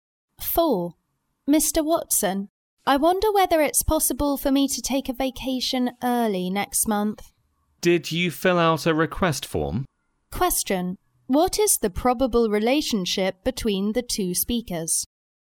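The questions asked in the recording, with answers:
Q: What is the probable relationship between the two speakers?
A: Employee and boss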